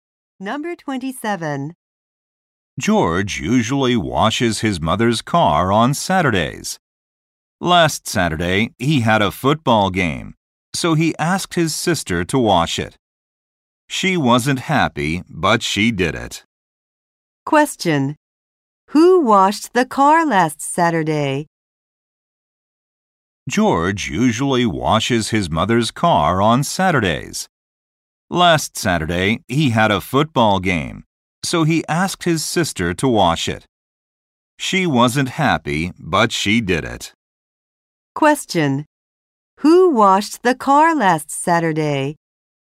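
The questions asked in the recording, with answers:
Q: Who washed the car last Saturday?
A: George's sister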